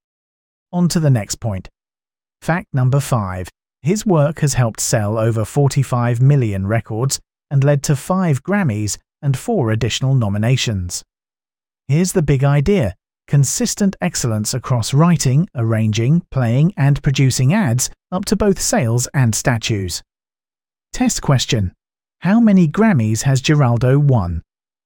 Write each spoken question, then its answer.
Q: How many Grammys has Giraldo won?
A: Correct answer. 5.